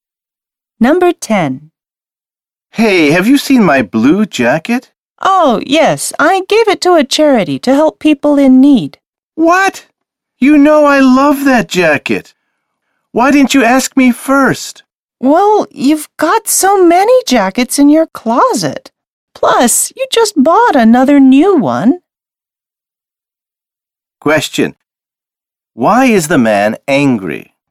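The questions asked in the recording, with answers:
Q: Why is the man angry?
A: The woman gave his favorite blue jacket to charity without asking him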